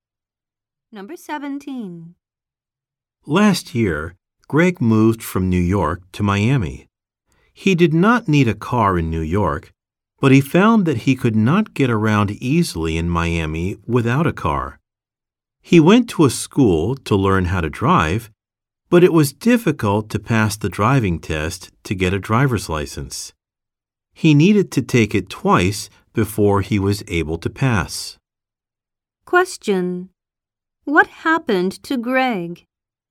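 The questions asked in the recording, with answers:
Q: What happened to Greg?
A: He had to take the driving test twice to pass.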